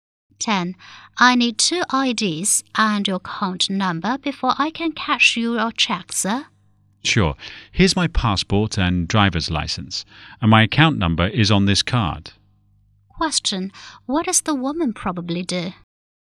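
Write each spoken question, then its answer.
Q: What does the woman probably do?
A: She is a bank clerk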